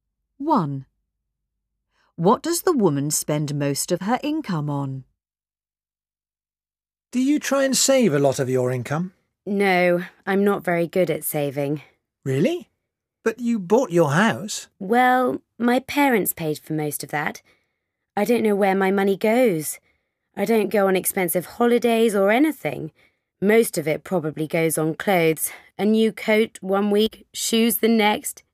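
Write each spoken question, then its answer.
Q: What does the woman spend most of her income on?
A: Clothes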